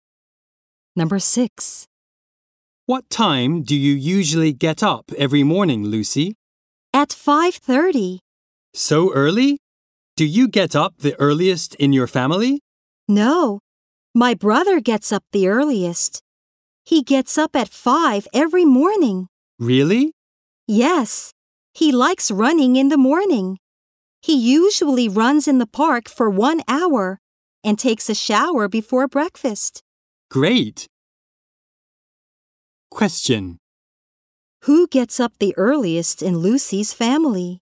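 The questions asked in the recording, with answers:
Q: Who gets up the earliest in Lucy's family?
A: Her brother.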